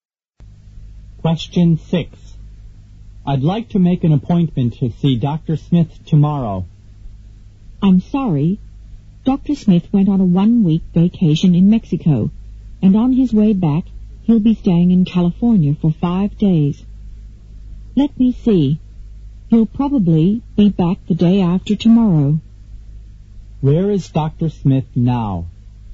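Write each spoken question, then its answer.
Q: Where is Dr. Smith now?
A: In California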